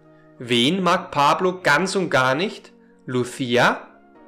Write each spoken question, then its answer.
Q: Wen mag Pablo ganz und gar nicht?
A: Er mag aber Irena ganz und gar nicht.